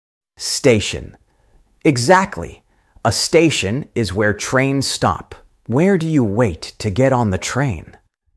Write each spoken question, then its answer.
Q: Where do you wait to get on the train?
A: Platform. Yes, you wait on the platform.